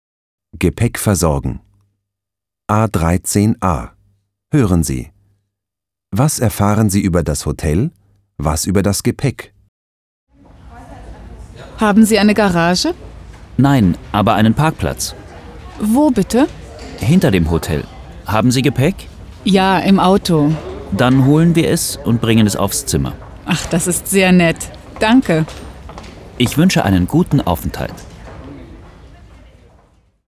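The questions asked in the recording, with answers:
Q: Was erfahren Sie über das Hotel?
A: Es hat keine Garage, aber einen Parkplatz hinter dem Hotel.

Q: Was über das Gepäck?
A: Das Gepäck ist im Auto; das Hotel holt es und bringt es aufs Zimmer.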